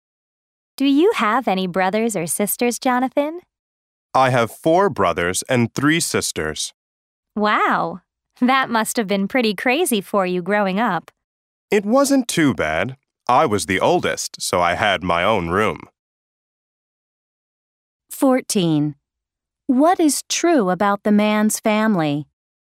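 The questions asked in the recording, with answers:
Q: What is true about the man's family?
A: He is the oldest of eight children (4 brothers and 3 sisters)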